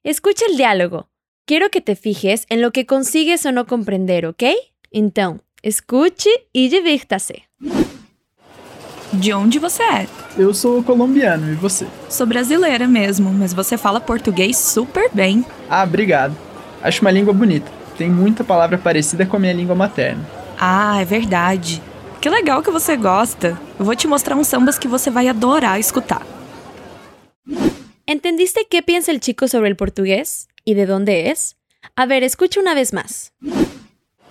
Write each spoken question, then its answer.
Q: Entendiste que pensa o chico sobre o português?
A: O sea, cree que el portugués es una lengua hermosa, que hay muchas palabras parecidas a su lengua materna.

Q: E de onde é?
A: O sea, es colombiano